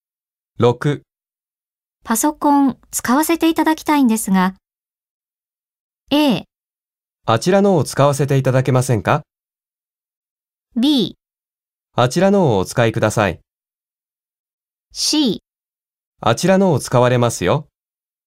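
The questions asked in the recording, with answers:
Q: パソコン使わせていただきたいんですが。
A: B: あちらのをお使いください。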